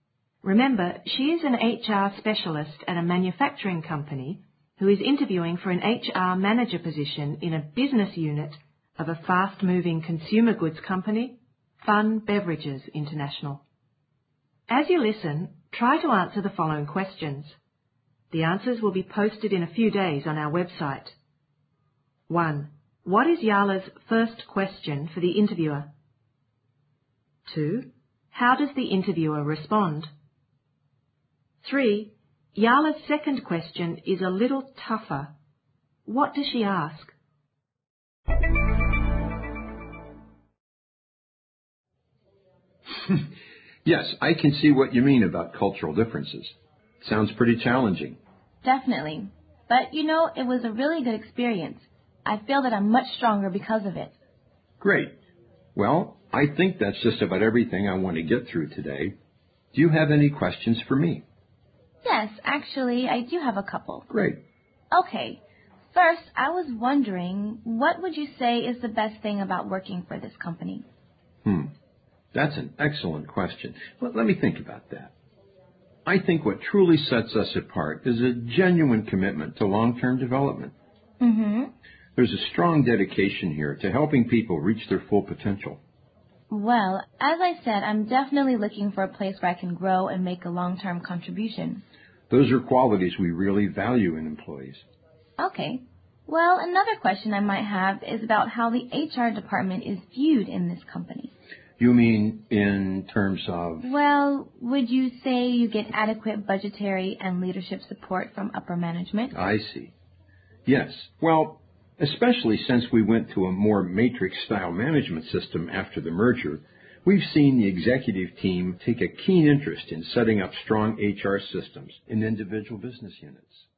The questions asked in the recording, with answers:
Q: What is Yala's first question for the interviewer?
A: Okay, first, I was wondering, what would you say is the best thing about working for this company?

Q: How does the interviewer respond?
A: I think what truly sets us apart is a genuine commitment to long-term development.

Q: What does she ask?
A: Well, would you say you get adequate budgetary and leadership support from upper management?